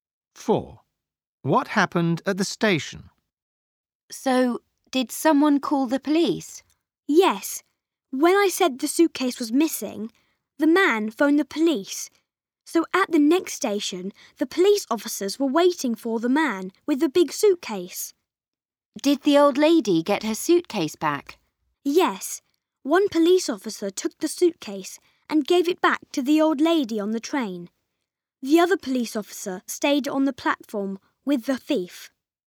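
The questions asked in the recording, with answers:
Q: What happened at the station?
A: Police officers were waiting, gave the suitcase back to the old lady and kept the thief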